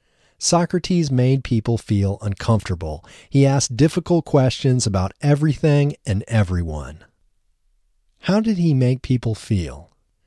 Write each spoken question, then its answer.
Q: How did he make people feel?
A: He made people feel uncomfortable.